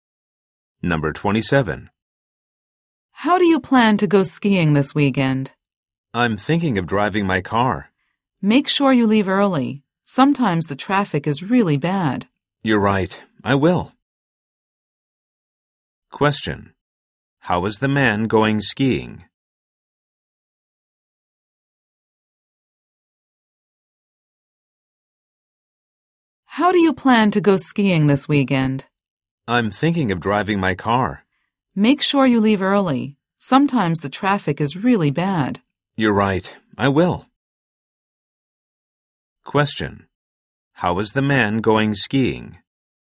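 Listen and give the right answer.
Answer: By car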